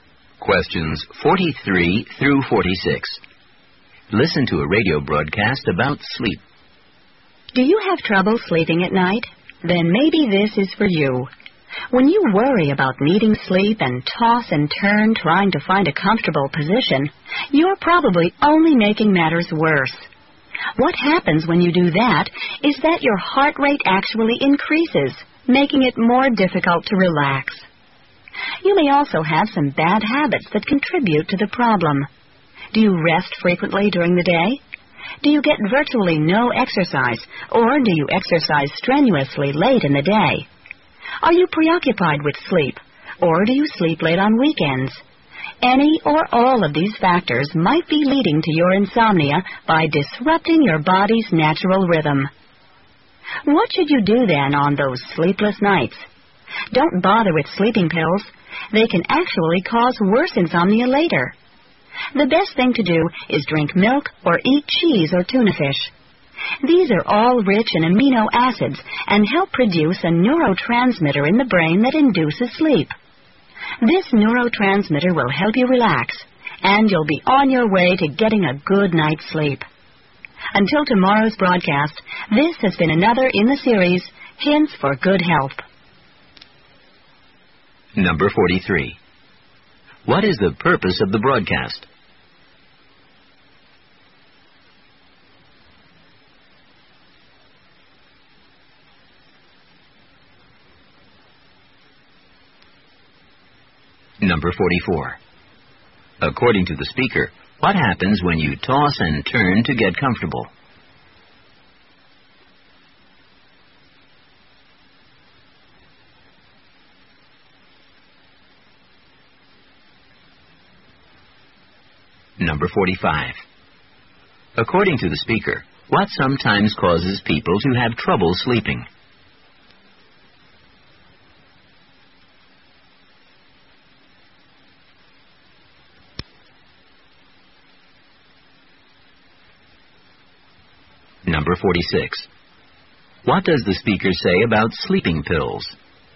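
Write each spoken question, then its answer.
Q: What is the purpose of the broadcast?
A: To give advice on how to sleep better

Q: According to the speaker, what happens when you toss and turn to get comfortable?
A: Your heart rate increases, making it harder to relax

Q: According to the speaker, what sometimes causes people to have trouble sleeping?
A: Bad habits that disrupt the body's natural rhythm

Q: What does the speaker say about sleeping pills?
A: They can cause worse insomnia later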